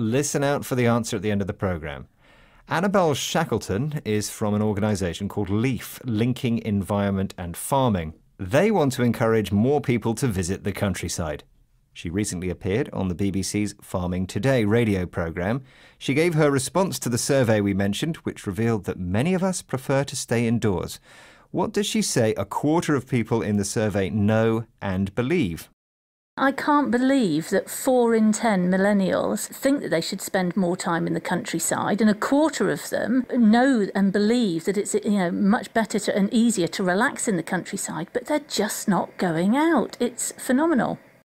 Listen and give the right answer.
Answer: Shackleton said that a quarter of millennials know and believe that it's better and easier to relax in the country, but they just don't go.